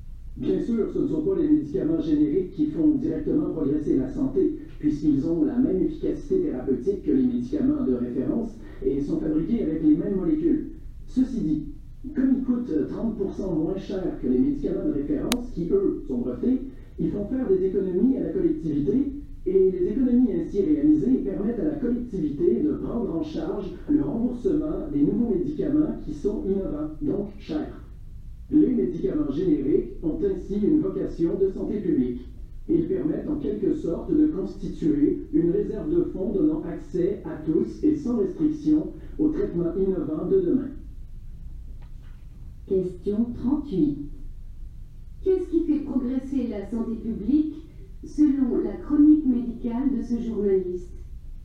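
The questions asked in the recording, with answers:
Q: Qu'est-ce qui fait progresser la santé publique selon la chronique médicale de ce journaliste?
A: Les économies réalisées grâce aux médicaments génériques, qui permettent de rembourser les nouveaux médicaments innovants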